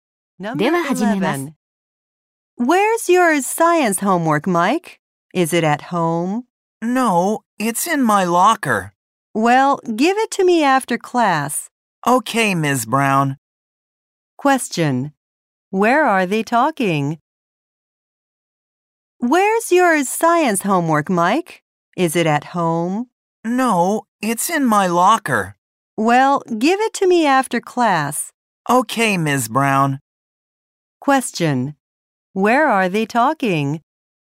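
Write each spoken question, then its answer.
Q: Question. Where are they talking?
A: At school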